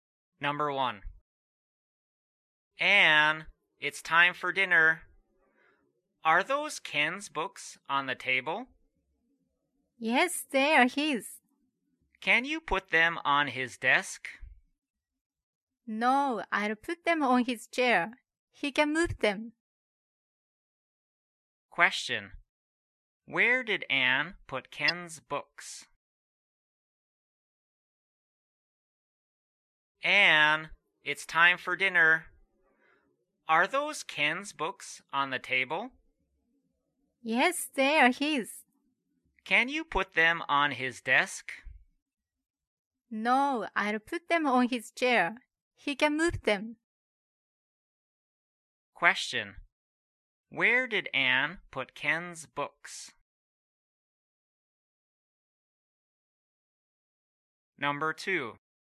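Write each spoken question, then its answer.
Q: Where did Anne put Ken's books?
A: On Ken's chair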